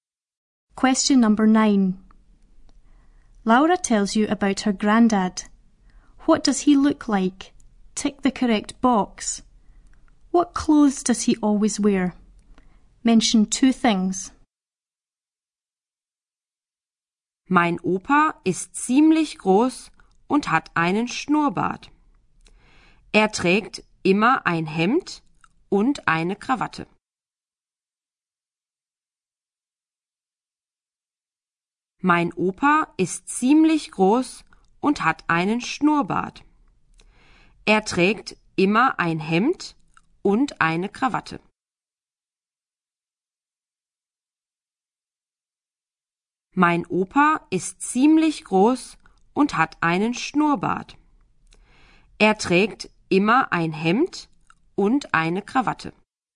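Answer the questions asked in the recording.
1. Quite tall with a moustache
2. A shirt and a tie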